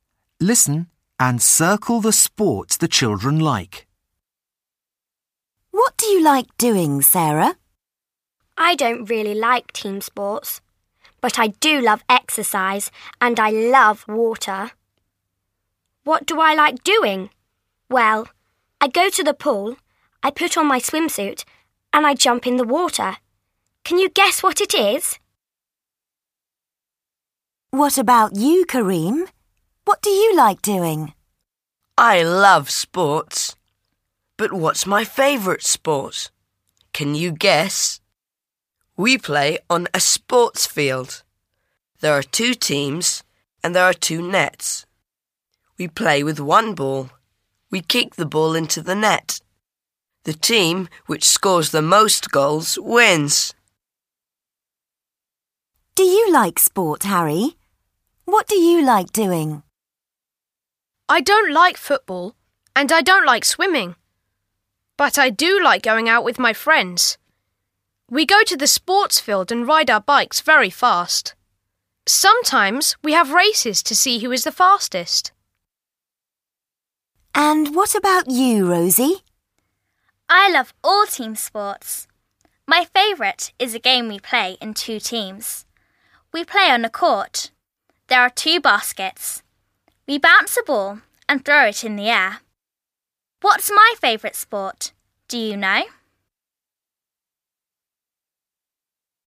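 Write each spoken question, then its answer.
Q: Can you guess what it is?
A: swimming

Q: Can you guess?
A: football

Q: What do you like doing?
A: riding bikes (cycling)

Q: What's my favourite sport? Do you know?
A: basketball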